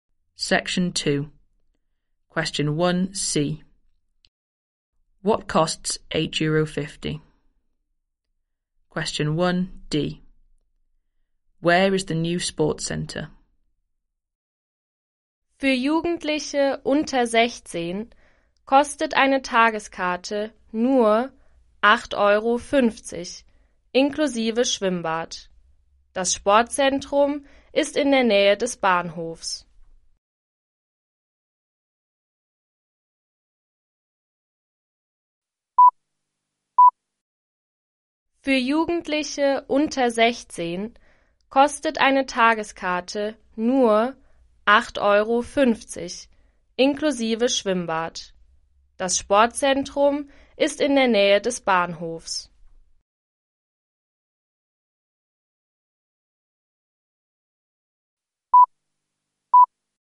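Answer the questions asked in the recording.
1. A day ticket for under-16s, including the pool
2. Near the station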